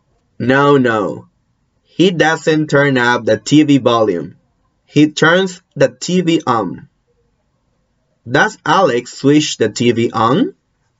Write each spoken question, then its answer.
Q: Does Alex switch the TV on?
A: Yes, he switches the TV on.